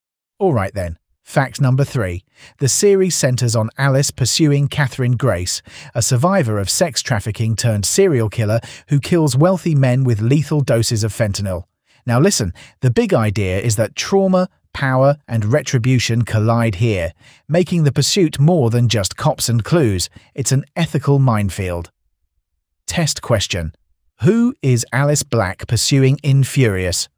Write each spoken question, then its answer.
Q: Who is Alice Black pursuing in Furious?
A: Catherine Grace.